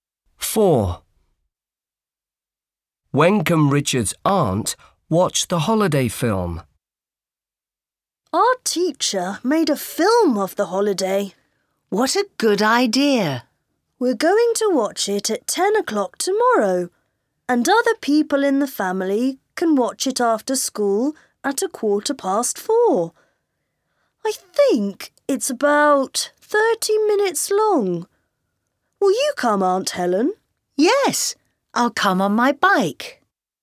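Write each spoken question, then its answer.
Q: When can Richard's aunt watch the holiday film?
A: At 4:15 after school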